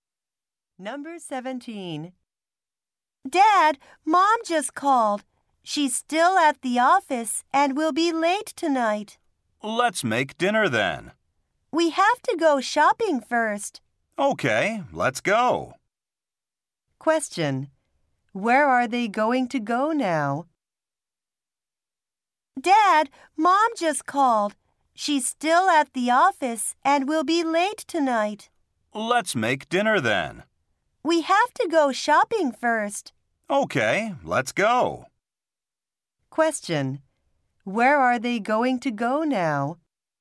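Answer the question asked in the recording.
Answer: Shopping.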